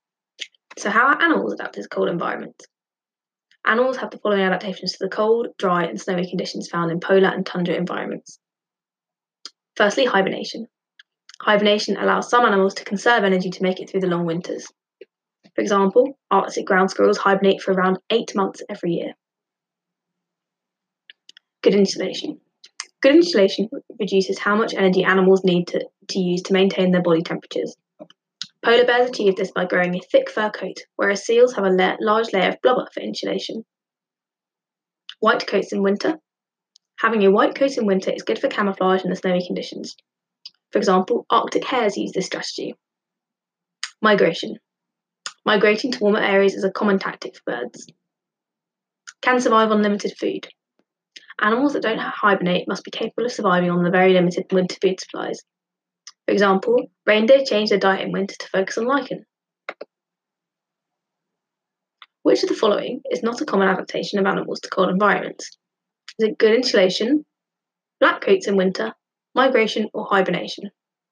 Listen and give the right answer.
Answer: The correct answer is black coats in winter.